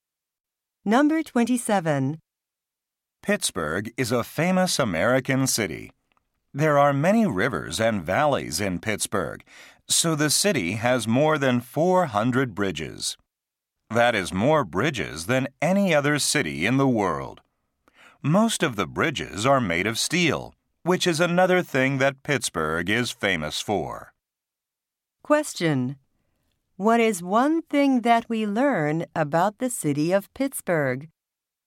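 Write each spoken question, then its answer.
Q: What is one thing that we learn about the city of Pittsburgh?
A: It has more bridges than any other city in the world.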